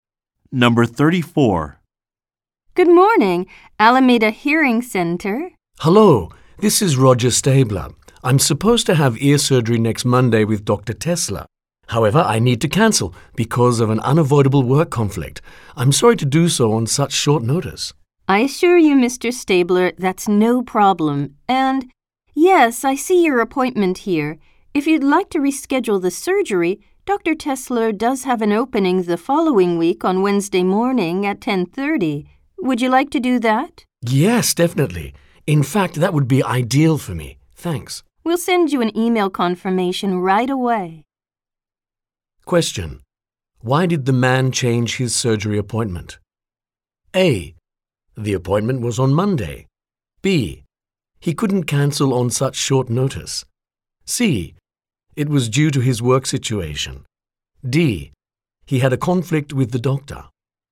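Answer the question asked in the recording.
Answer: C: It was due to his work situation.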